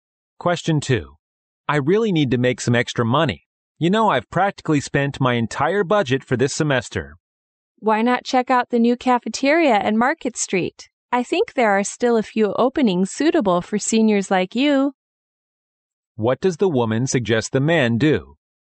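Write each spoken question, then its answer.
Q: What does the woman suggest the man do?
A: Apply for a job at the new cafeteria on Market Street.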